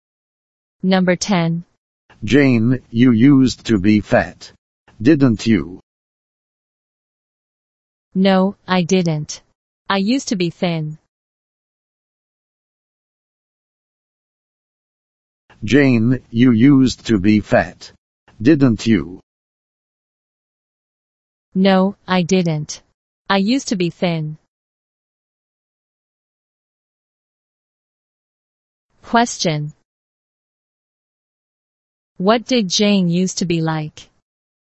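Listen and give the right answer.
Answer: Thin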